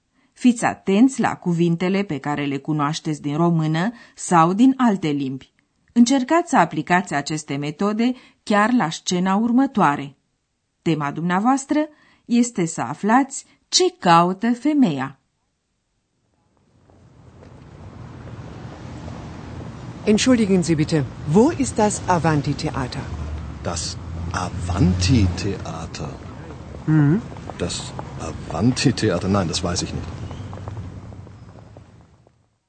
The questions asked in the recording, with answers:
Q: Tema dumneavoastră este să aflați ce caută femeia.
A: Ați înțeles că femeia caută un anumit teatru.